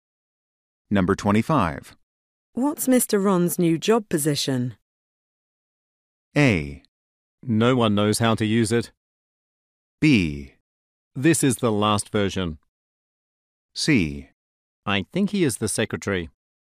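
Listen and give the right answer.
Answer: C: I think he is the secretary.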